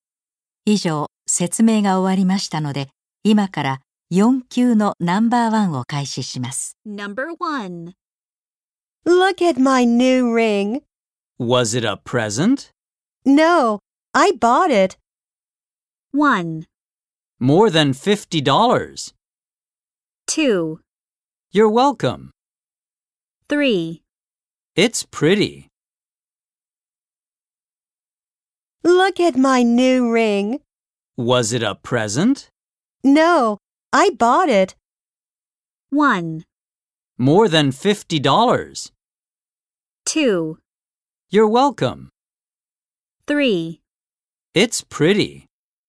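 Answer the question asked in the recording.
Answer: 3: It's pretty.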